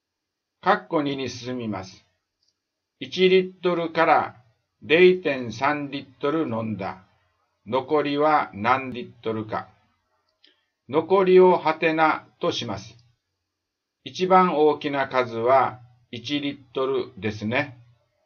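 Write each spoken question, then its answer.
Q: 1リットルから 0.3 リットル飲んだ。 残りは何リットルか。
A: 0.7リットル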